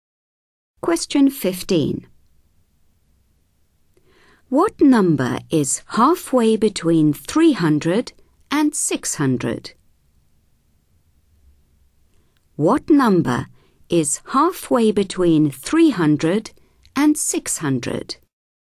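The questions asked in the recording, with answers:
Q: What number is halfway between 300 and 600?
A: 450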